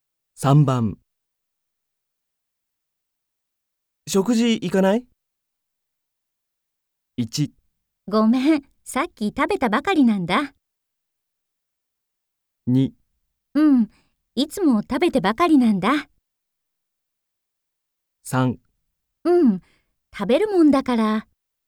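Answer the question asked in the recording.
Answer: 1: ごめん、さっき食べたばかりなんだ。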